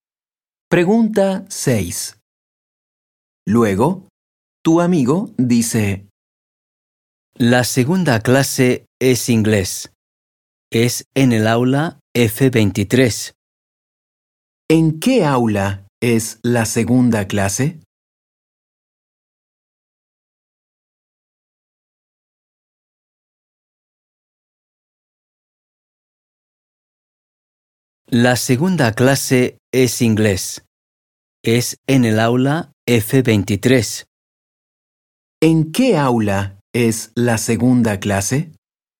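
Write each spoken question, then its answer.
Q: ¿En qué aula es la segunda clase?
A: En el aula F23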